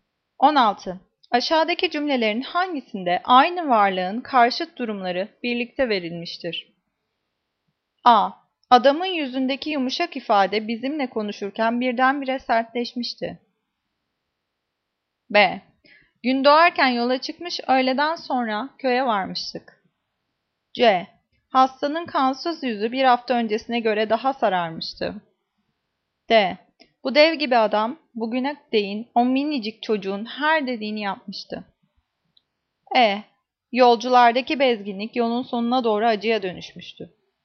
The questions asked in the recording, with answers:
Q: Aşağıdaki cümlelerin hangisinde aynı varlığın karşıt durumları birlikte verilmiştir?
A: Cevap A. Adamın yüzündeki yumuşak ifade bizimle konuşurken birdenbire sertleşmişti.